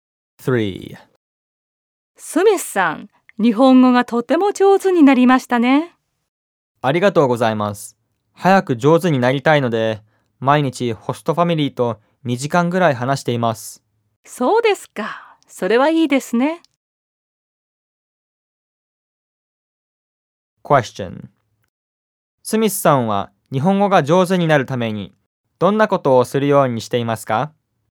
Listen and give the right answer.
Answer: スミスさんは毎日ホストファミリーと2時間話すようにしています。